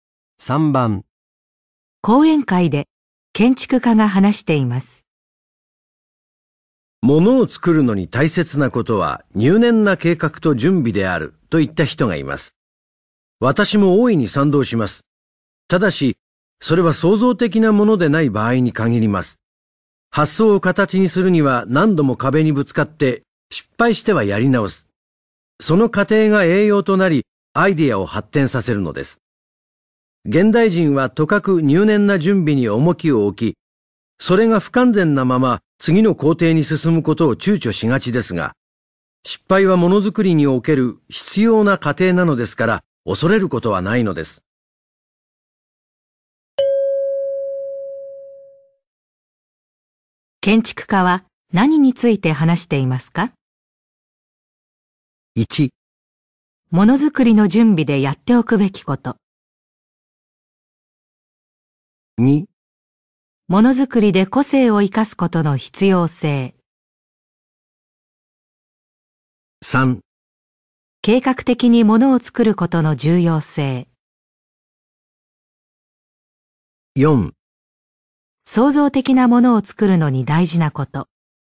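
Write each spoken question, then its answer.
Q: 建築家は何について話していますか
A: 4: 創造的なものを作るのに大事なこと。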